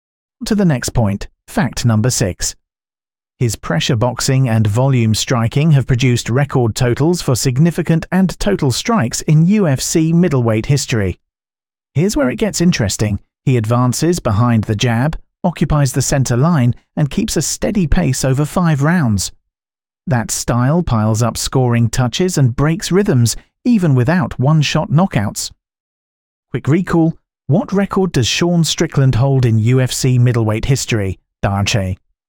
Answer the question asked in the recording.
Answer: Correct answer, most significant strikes landed.